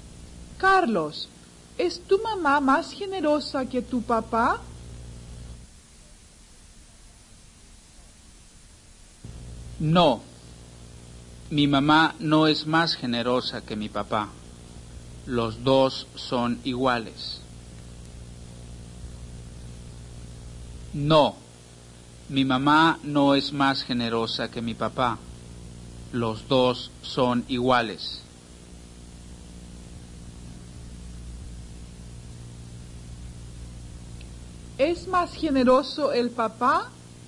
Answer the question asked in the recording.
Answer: no, los dos son iguales.